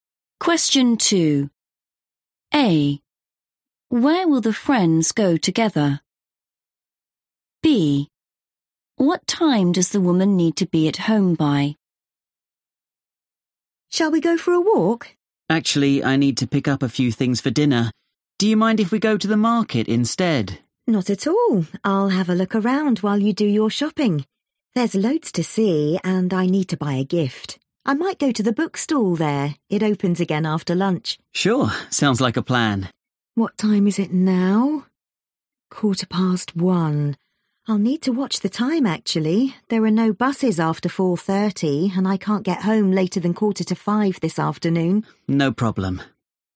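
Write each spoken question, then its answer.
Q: Where will the friends go together?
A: the market

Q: What time does the woman need to be at home by?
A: 4:45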